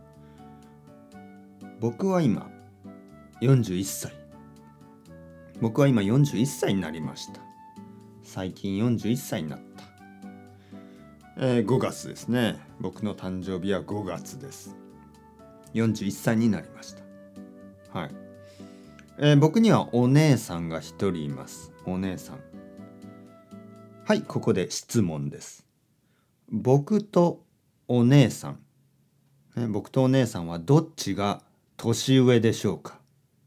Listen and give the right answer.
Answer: もちろん僕とお姉さんはお姉さんの方が年上ですね